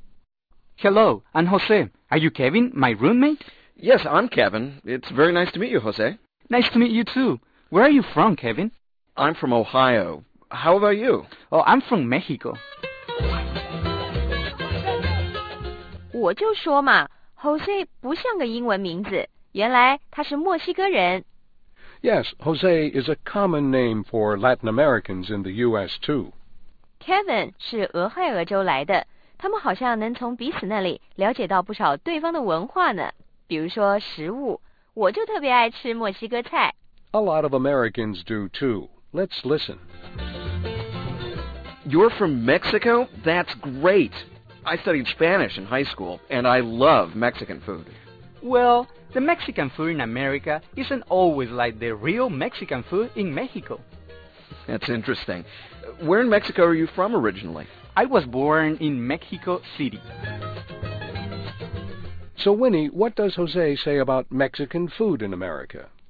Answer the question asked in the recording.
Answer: 他说美国的墨西哥菜不是真正的墨西哥菜